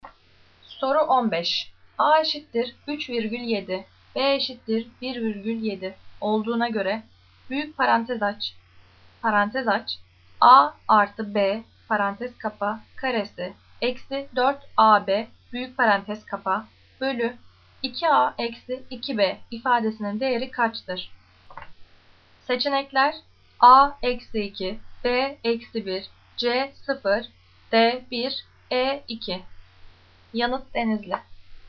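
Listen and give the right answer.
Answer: D: 1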